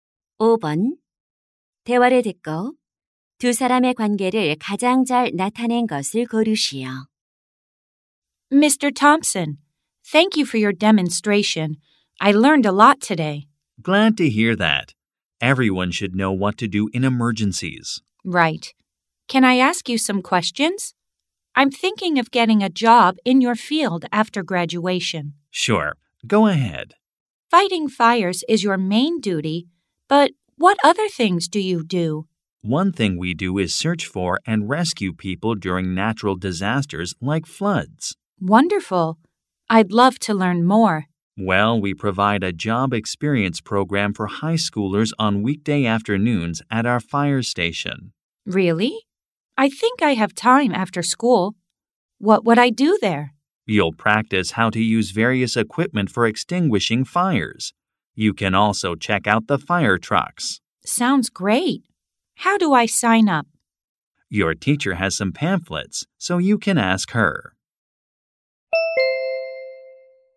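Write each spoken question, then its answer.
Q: 대화를 듣고 두 사람의 관계를 가장 잘 나타낸 것을 고르시오.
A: 소방관 - 고등학생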